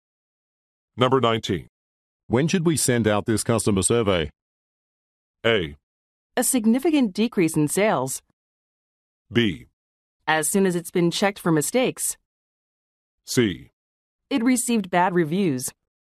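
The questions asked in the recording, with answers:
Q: When should we send out this customer survey?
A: B: As soon as it's been checked for mistakes.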